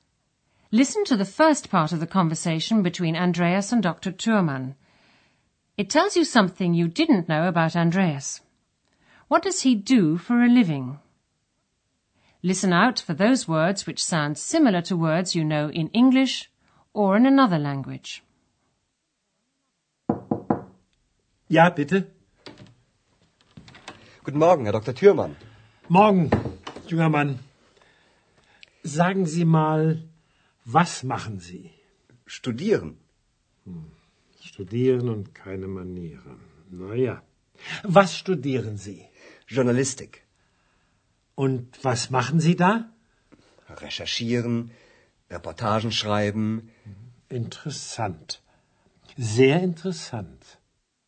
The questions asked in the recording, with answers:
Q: What does he do for a living?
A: Andreas is studying journalism.